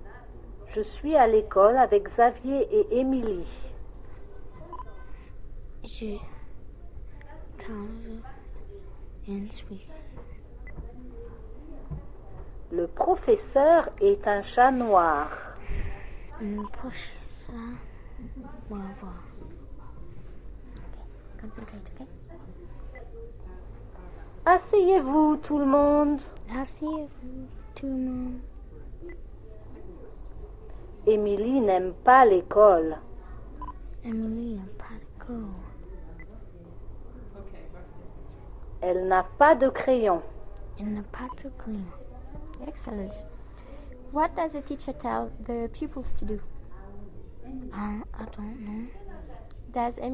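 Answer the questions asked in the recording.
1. Sit down
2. No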